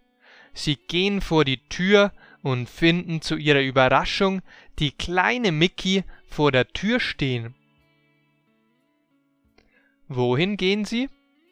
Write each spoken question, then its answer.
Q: Wohin gehen sie?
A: Vor die Haustür. Sie gehen vor die Haustür.